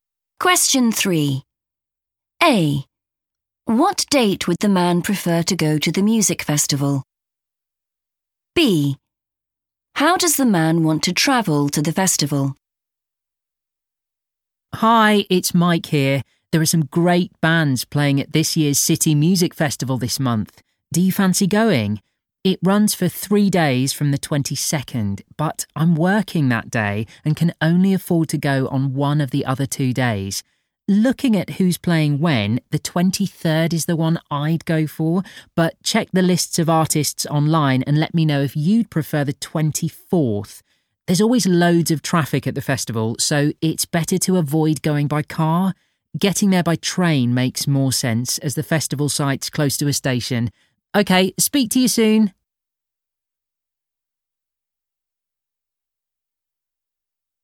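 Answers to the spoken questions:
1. the 23rd
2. by train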